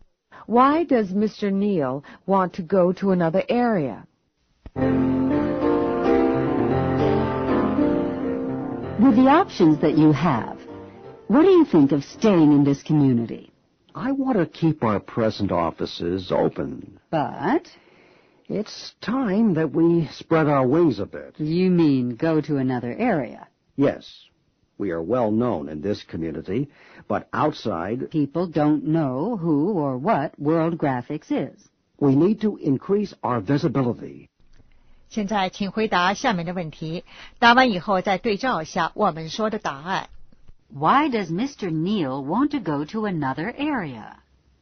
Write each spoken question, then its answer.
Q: Why does Mr. Neil want to go to another area?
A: To increase his company's visibility.